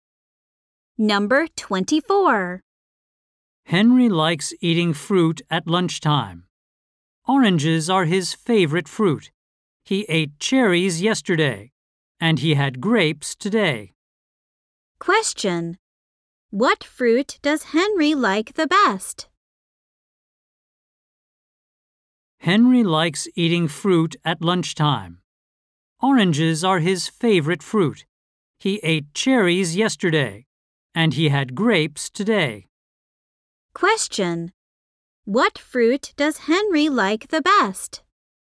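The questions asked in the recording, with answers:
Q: What fruit does Henry like the best?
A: Oranges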